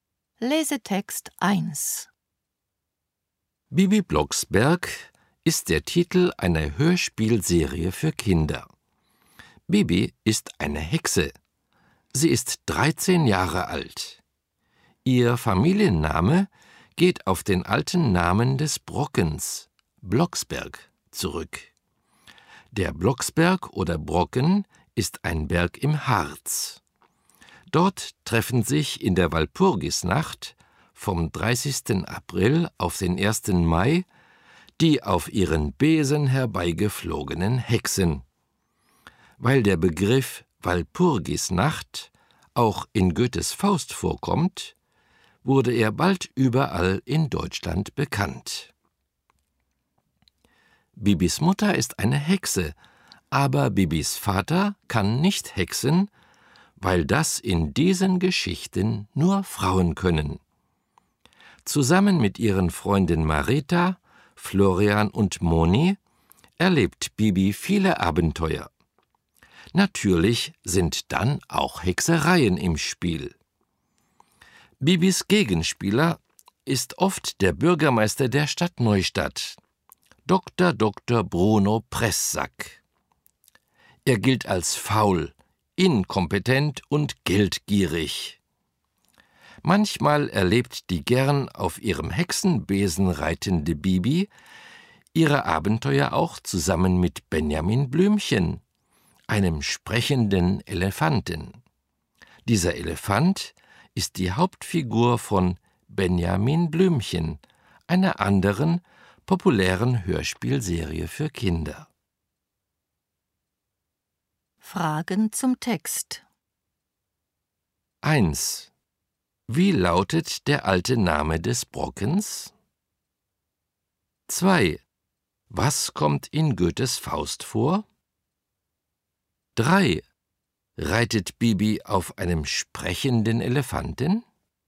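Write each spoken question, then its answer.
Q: Wie lautet der alte Name des Brockens?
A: Blocksberg

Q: Was kommt in Goethes Faust vor?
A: der Begriff Walpurgisnacht

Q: Reitet Bibi auf einem sprechenden Elefanten?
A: Nein, sie reitet auf ihrem Hexenbesen; Benjamin Blümchen ist nur manchmal bei ihren Abenteuern dabei.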